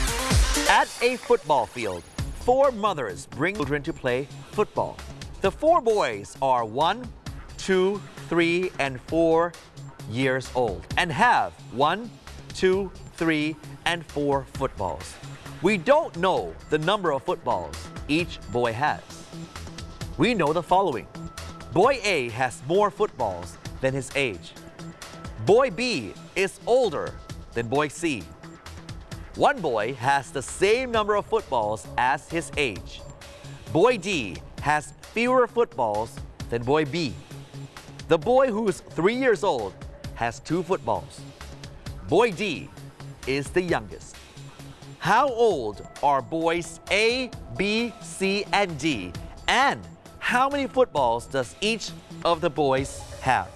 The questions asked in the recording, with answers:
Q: How old are boys A, B, C, and D?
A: A is a 2 years old boy and has 4 footballsB is 4 years old and has 3 football.

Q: And how many footballs does each of the boys have?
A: C is 3 years old and has 2 football.